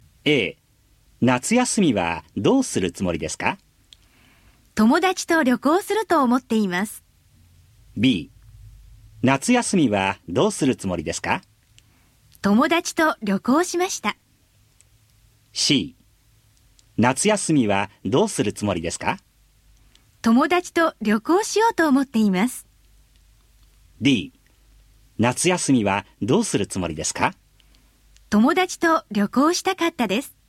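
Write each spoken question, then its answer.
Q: 夏休みはどうするつもりですか?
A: C: 友達と旅行しようと思っています。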